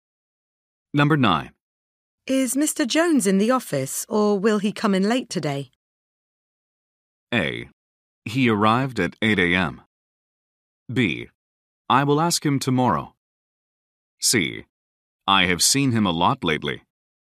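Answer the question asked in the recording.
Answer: A: He arrived at 8 a.m.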